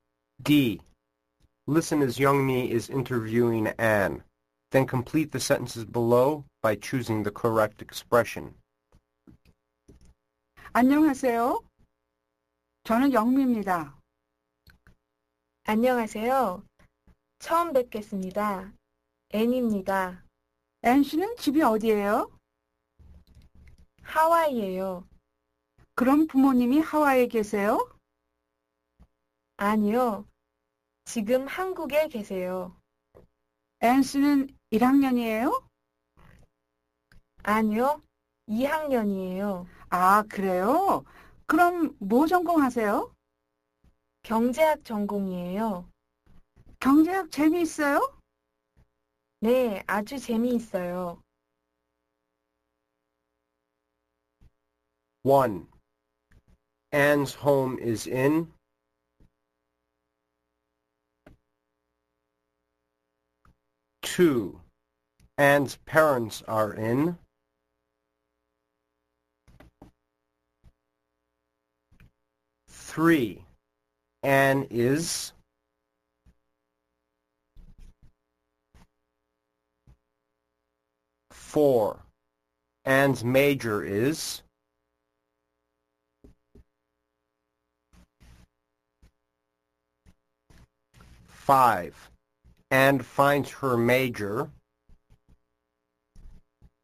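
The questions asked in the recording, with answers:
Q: Anne's home is in.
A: Hawaii

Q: Anne's parents are in.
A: Korea

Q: Anne is.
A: a second-year student (sophomore)

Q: Anne's major is.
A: economics

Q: Anne finds her major.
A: very interesting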